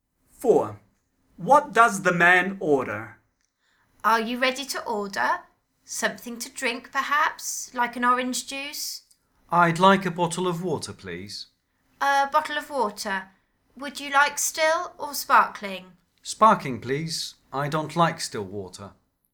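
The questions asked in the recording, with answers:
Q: What does the man order?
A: a bottle of sparkling water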